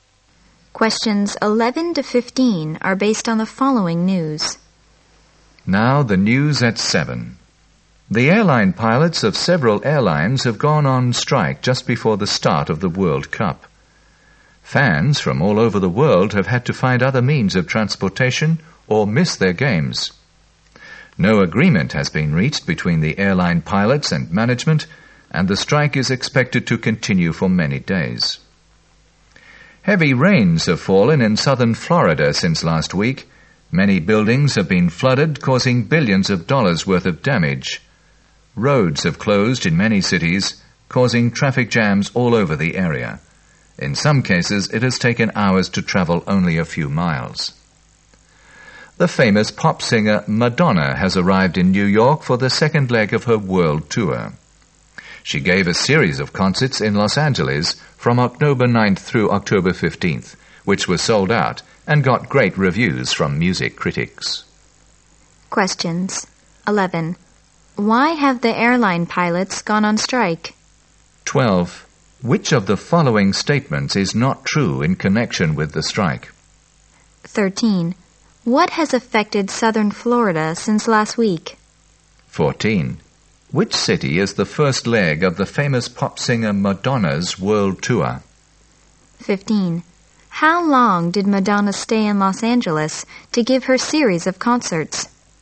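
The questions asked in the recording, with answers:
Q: What has affected southern Florida since last week?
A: Heavy rains and flooding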